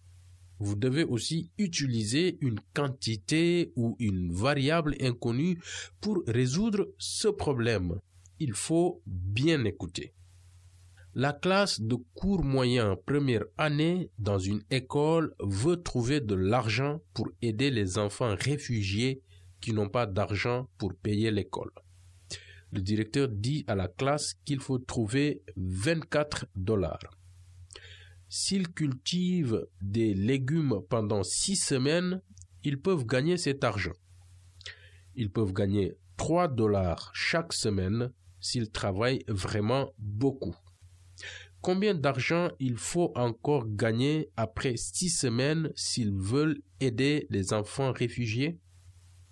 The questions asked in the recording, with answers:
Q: Combien d'argent il faut encore gagner après 6 semaines s'ils veulent aider les enfants réfugiés?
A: On doit gagner 6 dollars de plus pour aider les enfants réfugiés.